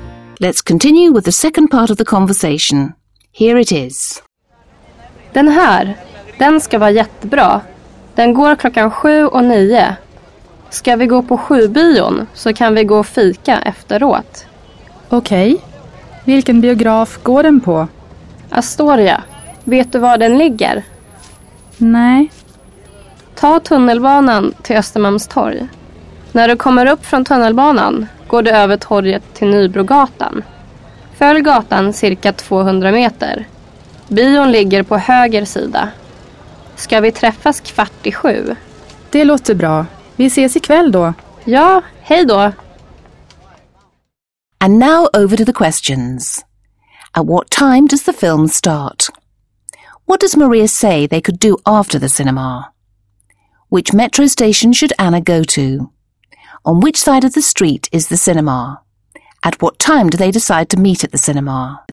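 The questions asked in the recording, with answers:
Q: At what time does the film start?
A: 7 o'clock

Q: What does Maria say they could do after the cinema?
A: Have coffee (fika)

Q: Which metro station should Anna go to?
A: Östermalmstorg

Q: On which side of the street is the cinema?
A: The right side

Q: At what time do they decide to meet at the cinema?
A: 7:15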